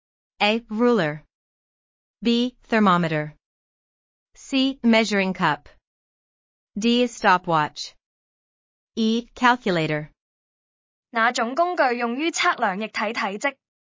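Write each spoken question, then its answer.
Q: Which tool measures liquid volume?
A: C: Measuring cup.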